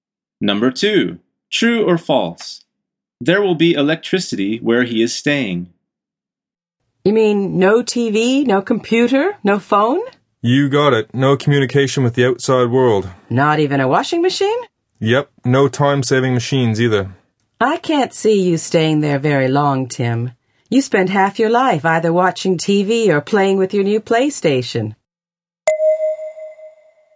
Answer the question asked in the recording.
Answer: The answer is false.